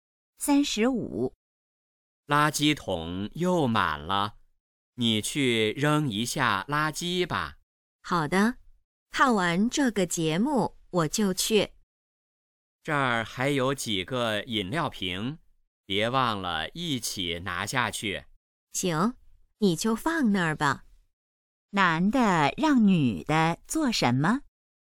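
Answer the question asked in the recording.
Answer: 扔垃圾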